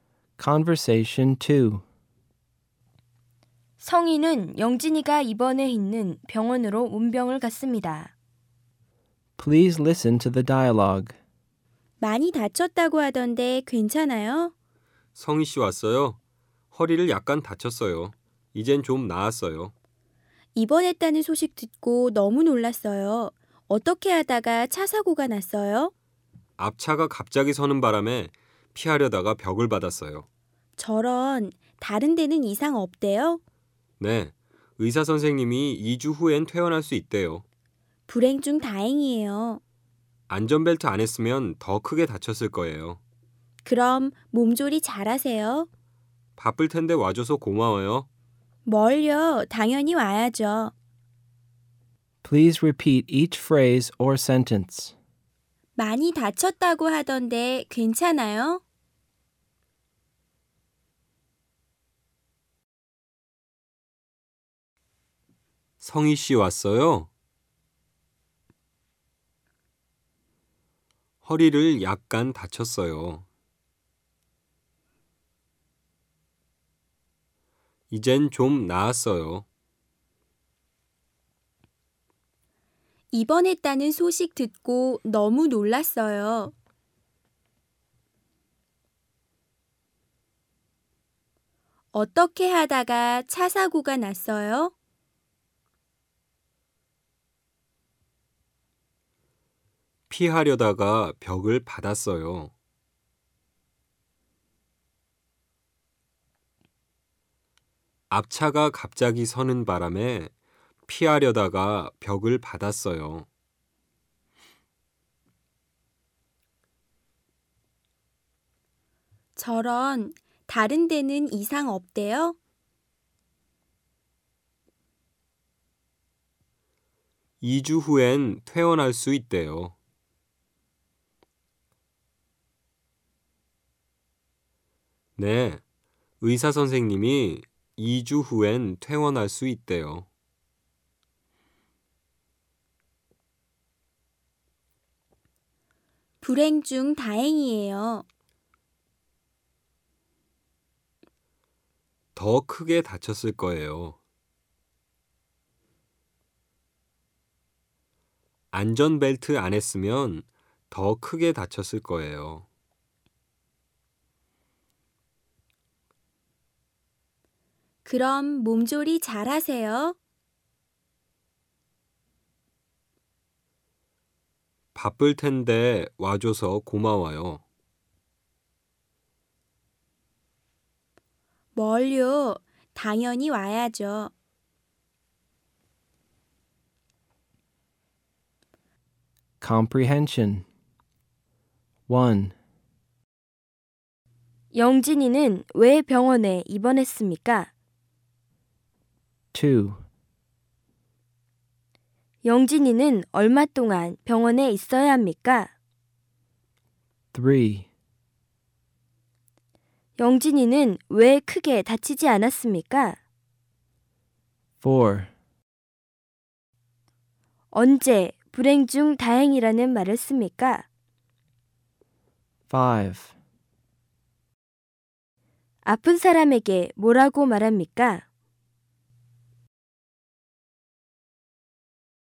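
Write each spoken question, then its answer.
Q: 영진이는 왜 병원에 입원했습니까?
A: 차 사고가 나서 허리를 다쳤습니다 (앞차가 갑자기 서서 피하려다가 벽을 받았습니다).

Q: 영진이는 얼마 동안 병원에 있어야 합니까?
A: 2주 동안

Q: 영진이는 왜 크게 다치지 않았습니까?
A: 안전벨트를 했기 때문입니다.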